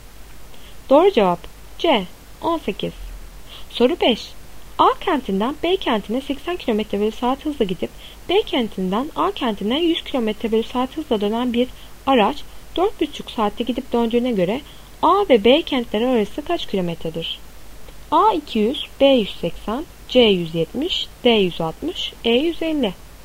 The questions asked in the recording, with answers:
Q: A kentinden B kentine 80 km/saat hızla gidip B kentinden A kentine 100 km/saat hızla dönen bir araç 4,5 saatte gidip döndüğüne göre A ve B kentleri arası kaç kilometredir?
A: Doğru cevap A 200.